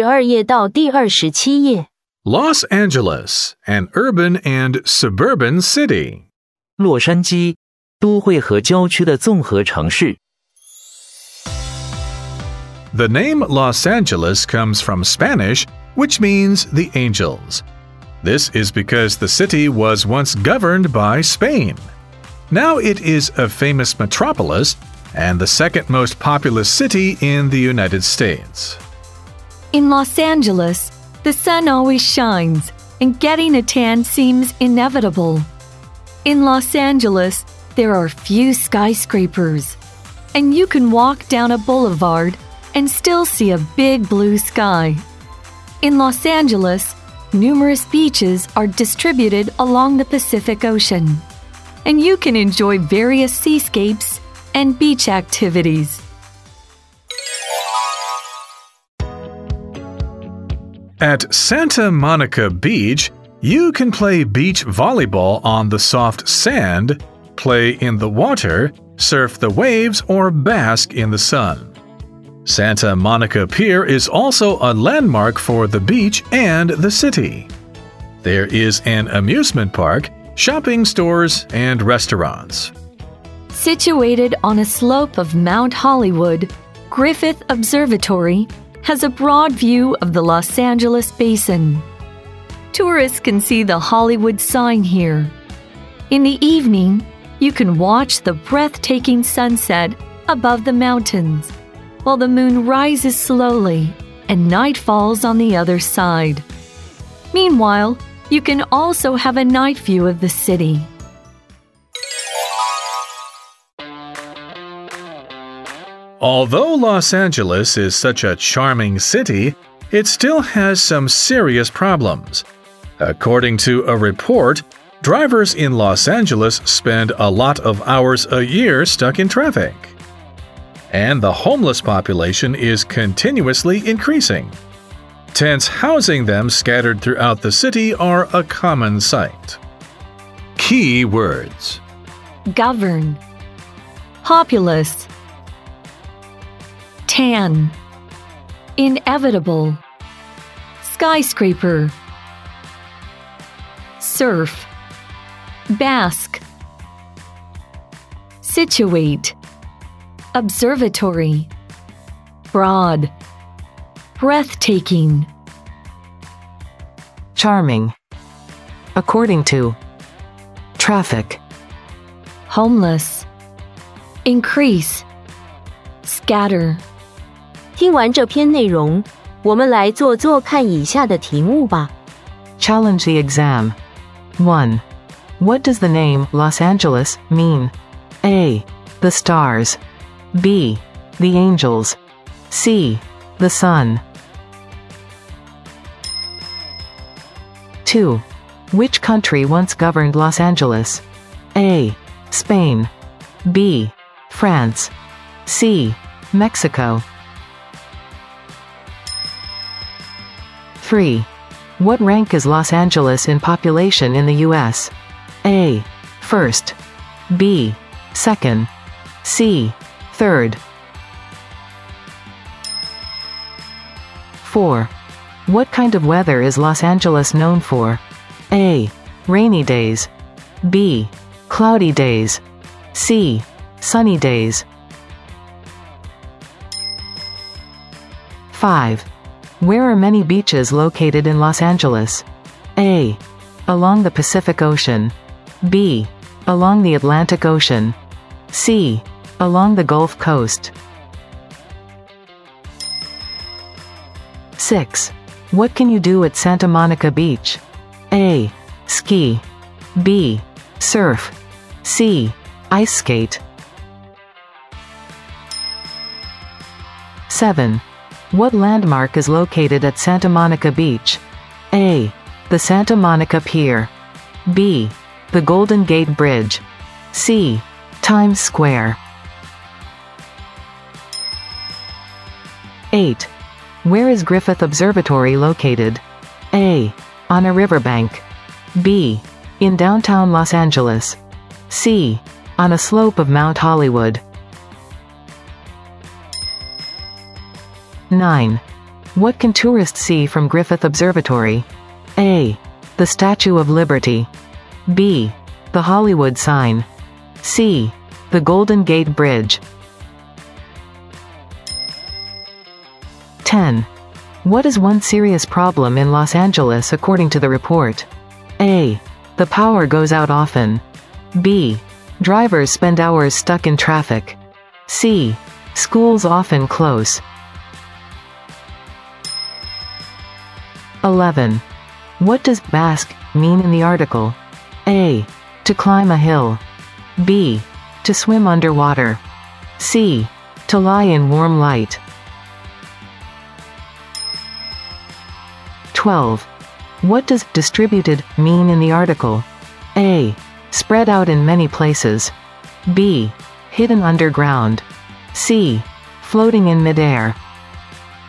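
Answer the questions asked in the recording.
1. B: The angels.
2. A: Spain.
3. B: 2nd.
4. C: Sunny days.
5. A: Along the Pacific Ocean.
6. B: Surf.
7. A: The Santa Monica Pier.
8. C: On a slope of Mount Hollywood.
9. B: The Hollywood sign.
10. B: Drivers spend hours stuck in traffic.
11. C: To lie in warm light.
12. A: Spread out in many places.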